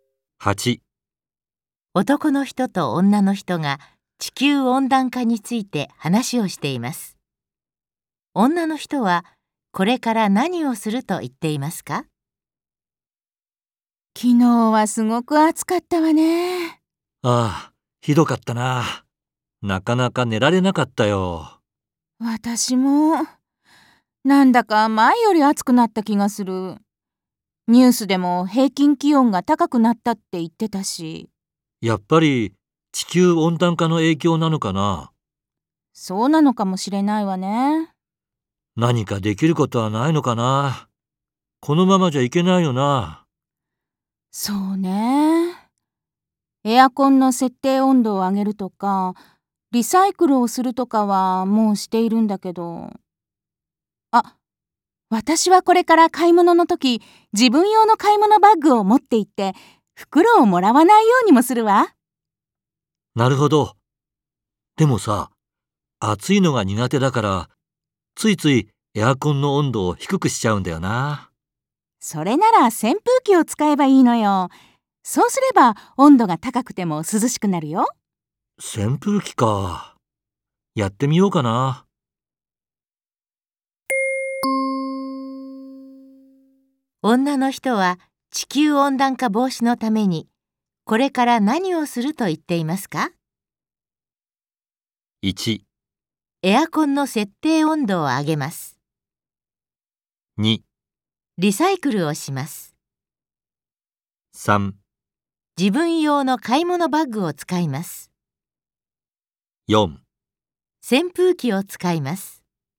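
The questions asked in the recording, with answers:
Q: 女の人は地球温暖化防止のためにこれから何をすると言っていますか?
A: 3: 自分用の買い物バッグを使います。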